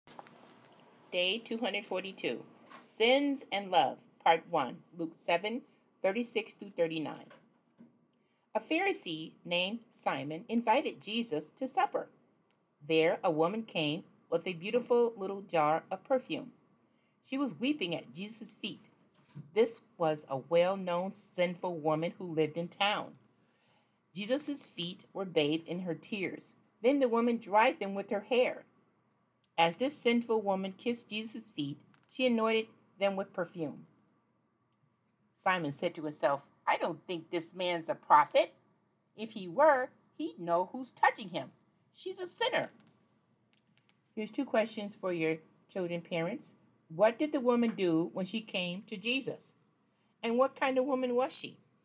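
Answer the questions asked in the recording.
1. She wept at his feet, dried them with her hair, kissed them and anointed them with perfume
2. A well-known sinful woman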